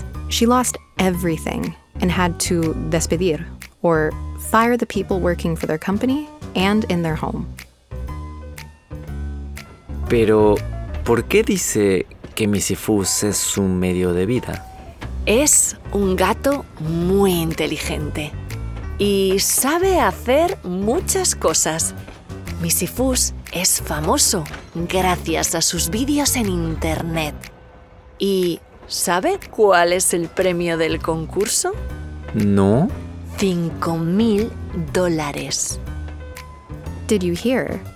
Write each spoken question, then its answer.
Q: ¿Cuál es el premio del concurso?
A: Right. It's cinco mil dólares, $5,000.